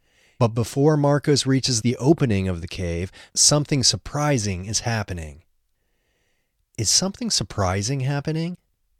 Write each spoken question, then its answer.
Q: Is something surprising happening?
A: Yes, something surprising is happening.